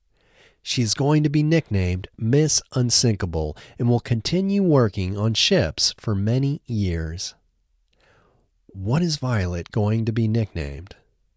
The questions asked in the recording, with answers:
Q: What is Violet going to be nicknamed?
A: Violet is going to be nicknamed Miss Unsinkable.